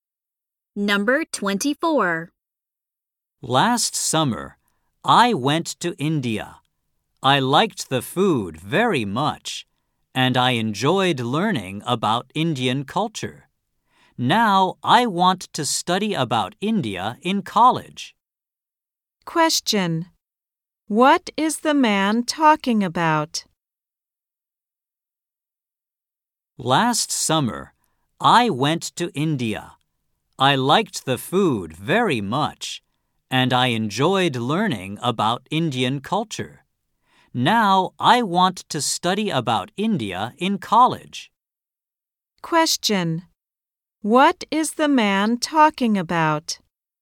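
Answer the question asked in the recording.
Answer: His trip to India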